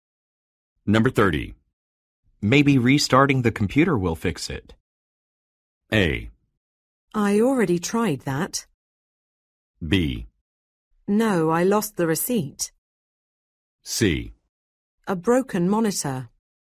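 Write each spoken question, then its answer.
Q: Maybe restarting the computer will fix it.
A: A: I already tried that.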